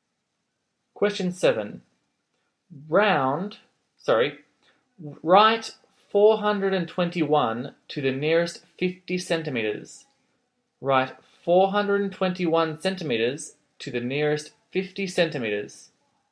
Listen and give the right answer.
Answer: your answer is 400 centimeters.